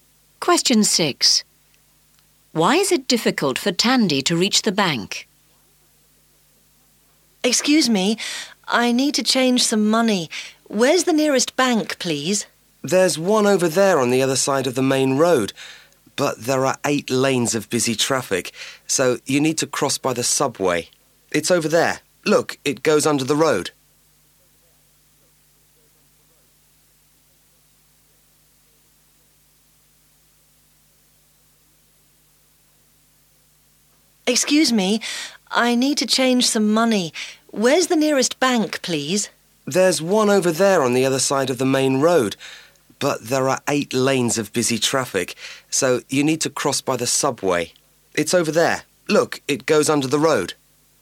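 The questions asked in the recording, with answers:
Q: Why is it difficult for Tandy to reach the bank?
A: There are 8 lanes of busy traffic, so she must use the subway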